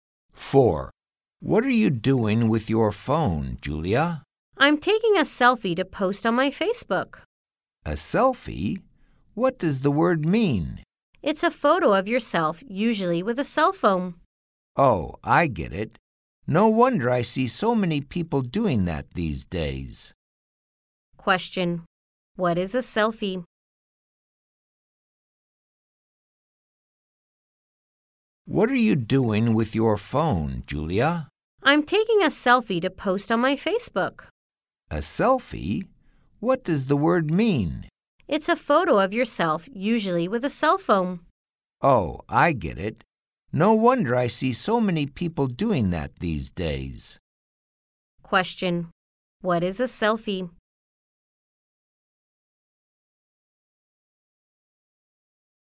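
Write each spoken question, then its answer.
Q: Question. What is a selfie?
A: A photo of yourself, usually taken with a cell phone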